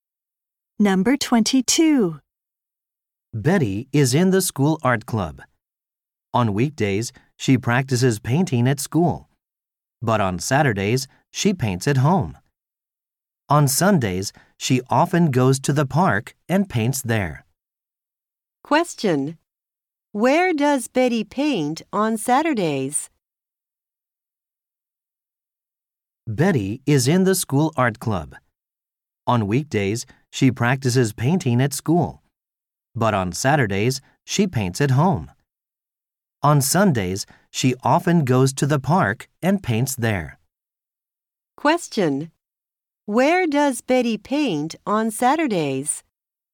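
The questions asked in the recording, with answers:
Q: Where does Betty paint on Saturdays?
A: At home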